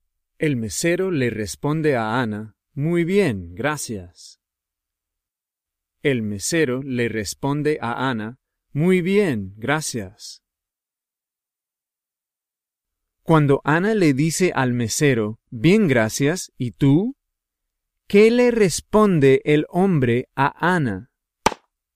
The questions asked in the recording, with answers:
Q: ¿Qué le responde el hombre a Ana?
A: El mesero le responde a Ana, muy bien, gracias.